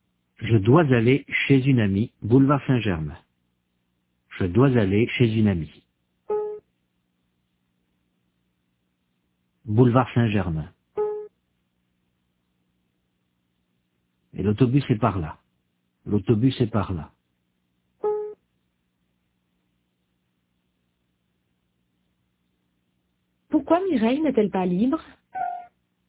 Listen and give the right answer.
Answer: Parce qu'elle doit aller chez une amie.